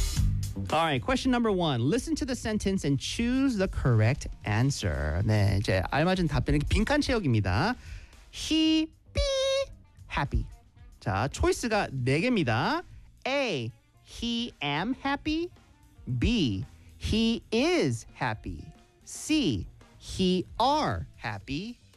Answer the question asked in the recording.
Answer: 정답은 B. He is happy.